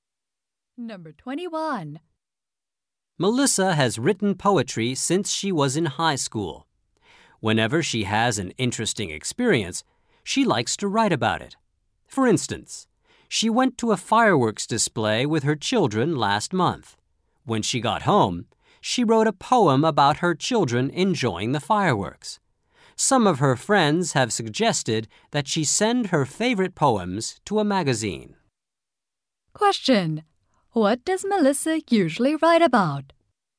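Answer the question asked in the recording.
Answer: Her interesting experiences.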